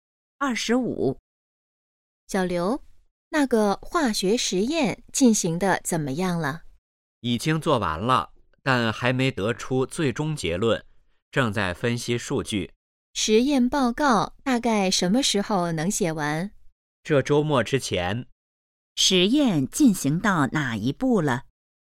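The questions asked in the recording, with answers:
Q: 实验进行到哪一步了?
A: 正在分析数据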